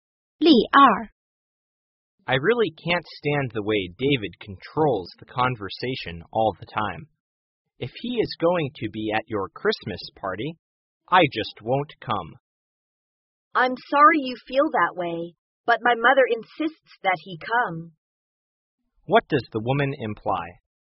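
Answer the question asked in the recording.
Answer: David will be at the party because her mother insists.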